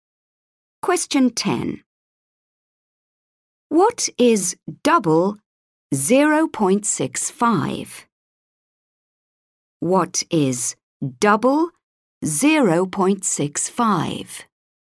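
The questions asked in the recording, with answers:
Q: What is double 0.65?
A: 1.3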